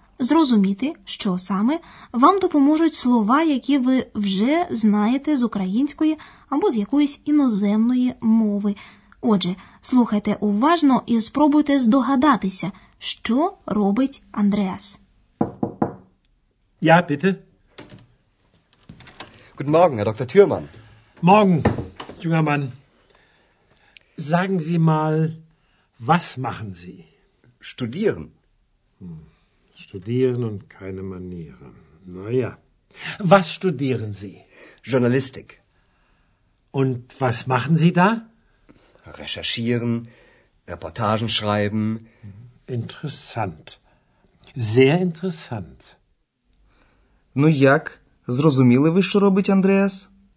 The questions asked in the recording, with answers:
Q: Зрозуміли ви, що робить Андреас?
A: Андреас вивчає журналістику.